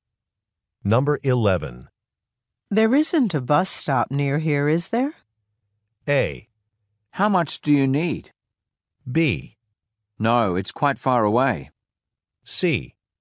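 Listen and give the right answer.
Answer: B: No, it's quite far away.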